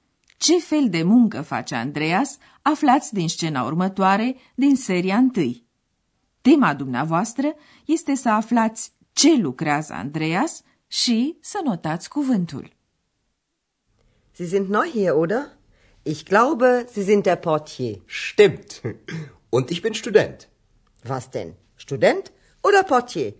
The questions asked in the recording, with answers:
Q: Tema dumneavoastră este să aflați ce lucrează Andreas și să notați cuvântul.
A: Andreas este portie.